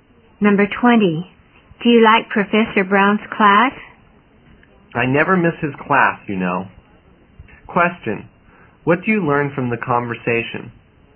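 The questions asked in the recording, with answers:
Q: what do you learn from the conversation?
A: The speaker likes Professor Brown's class very much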